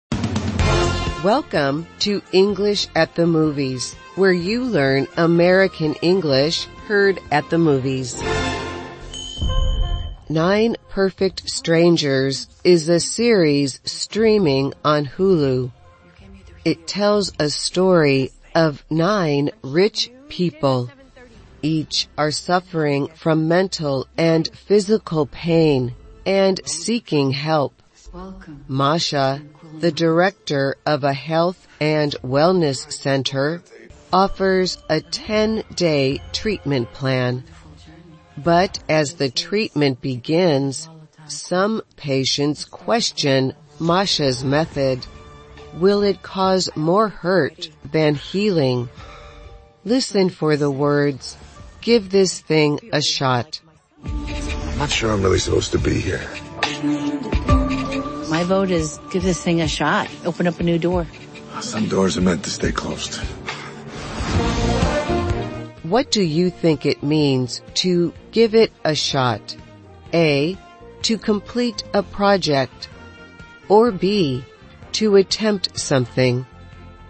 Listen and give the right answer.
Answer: The answer is B, to attempt something.